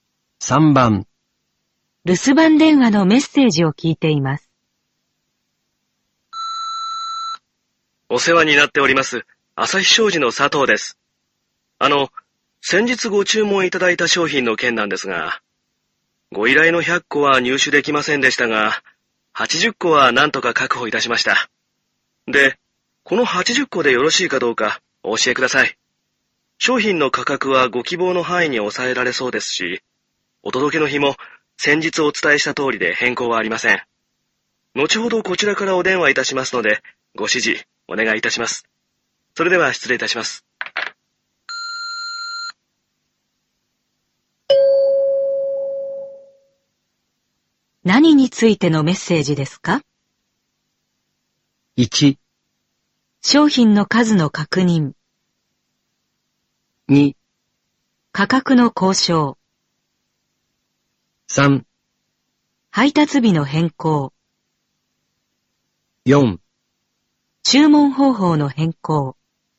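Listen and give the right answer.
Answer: 1: 商品の数の確認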